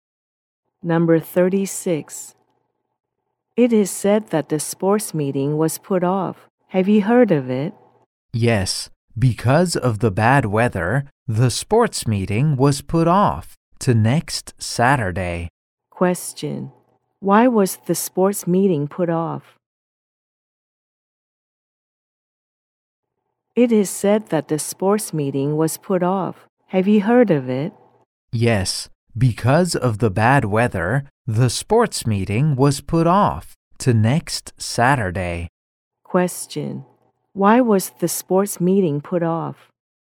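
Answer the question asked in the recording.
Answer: Because of the bad weather.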